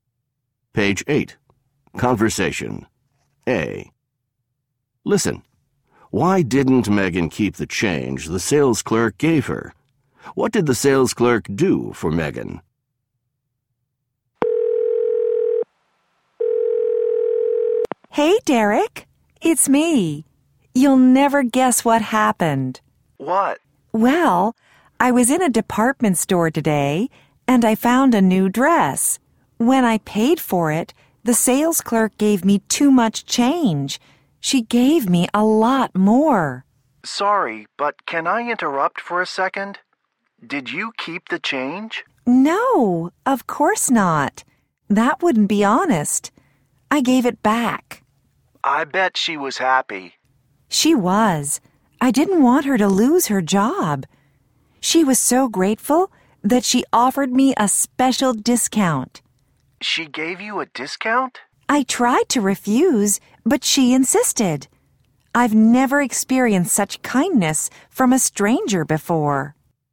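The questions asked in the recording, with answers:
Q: Why didn't Megan keep the change the sales clerk gave her?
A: It wouldn't be honest, and she didn't want the clerk to lose her job.

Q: What did the sales clerk do for Megan?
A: She gave Megan a special discount.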